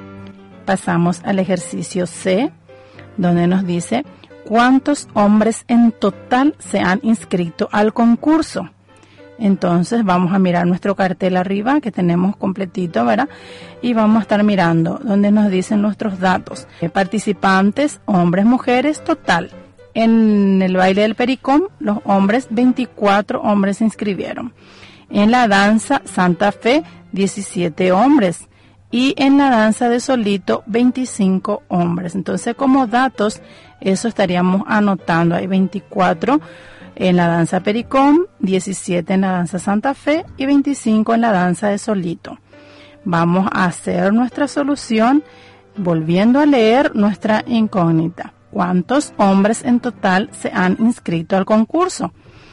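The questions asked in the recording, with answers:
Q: ¿Cuántos hombres en total se han inscrito al concurso?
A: 66 hombres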